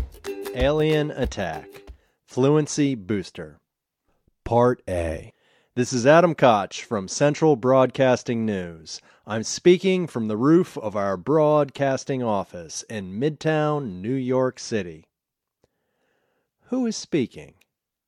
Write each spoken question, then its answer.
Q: Who is speaking?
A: Adam Koch is speaking.